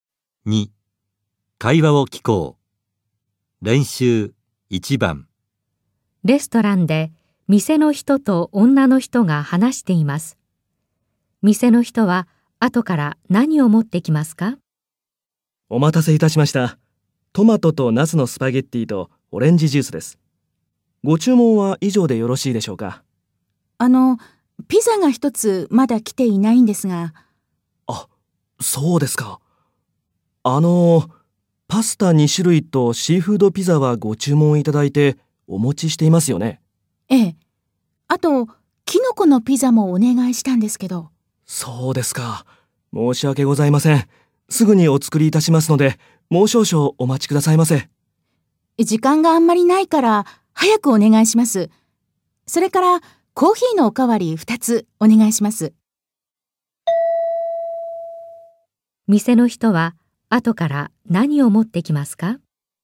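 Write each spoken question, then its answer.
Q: 店の人は、後から何を持ってきますか?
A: キノコのピザとコーヒーのおかわり2つ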